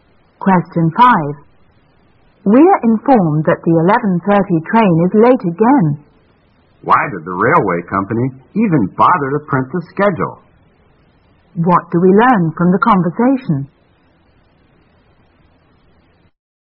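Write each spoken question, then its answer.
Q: What do we learn from the conversation?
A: The train is often late, so the schedule is unreliable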